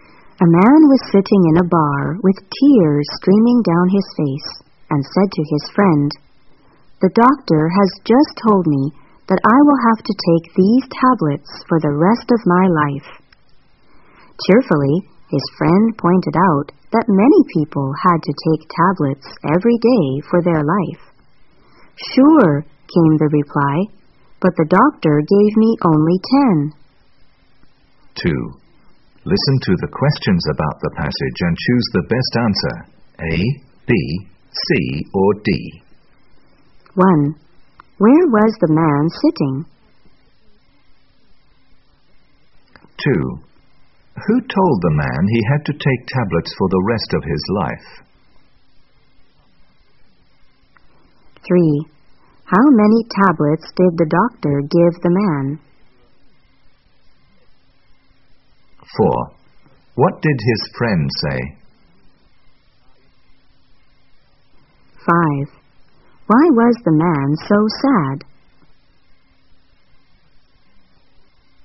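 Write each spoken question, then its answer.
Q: Where was the man sitting?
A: In a bar

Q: Who told the man he had to take tablets for the rest of his life?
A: The doctor

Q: How many tablets did the doctor give the man?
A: Only 10

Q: What did his friend say?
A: Many people had to take tablets every day for their life

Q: Why was the man so sad?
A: He had only 10 tablets, so he would die soon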